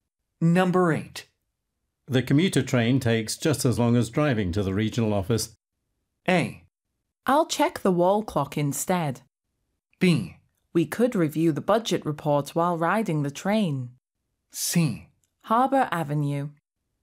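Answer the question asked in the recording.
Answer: B: We could review the budget report while riding the train.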